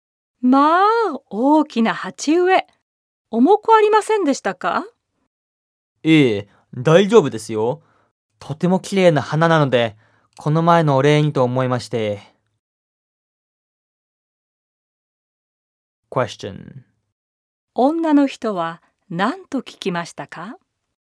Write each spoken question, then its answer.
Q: 女の人は何と聞きましたか?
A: 女の人は鉢植えが重くなかったかと聞きました。